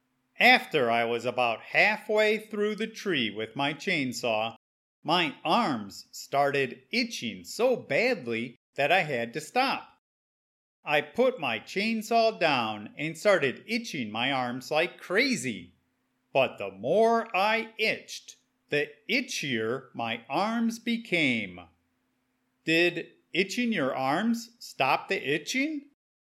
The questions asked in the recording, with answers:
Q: Did itching your arms stop the itching?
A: No. Itching my arms actually made the itching worse.